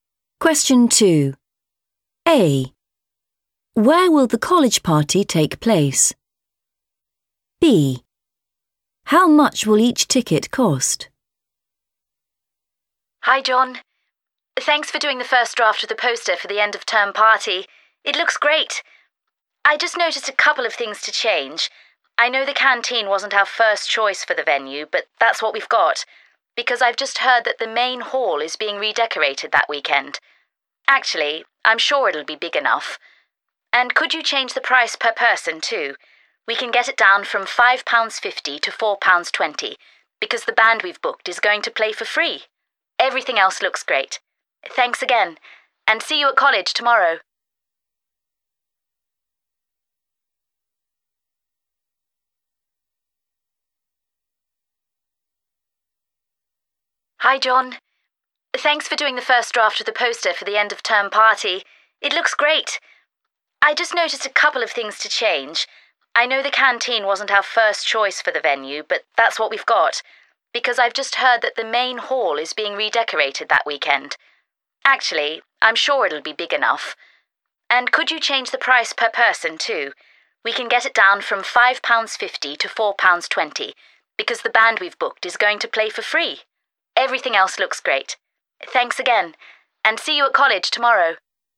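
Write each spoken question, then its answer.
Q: Where will the college party take place?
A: the canteen

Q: How much will each ticket cost?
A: £4.20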